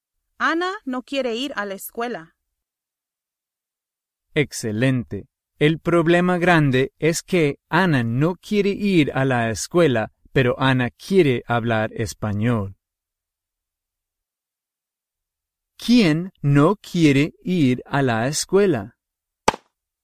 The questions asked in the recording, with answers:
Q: ¿Quién no quiere ir a la escuela?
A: Ana.